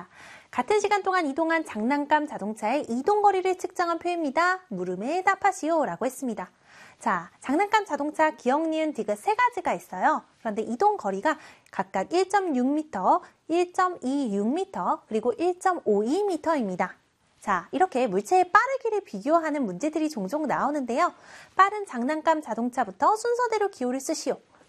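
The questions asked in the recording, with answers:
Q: 빠른 장난감 자동차부터 순서대로 기호를 쓰시오.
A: ᄀ, ᄃ, ᄂ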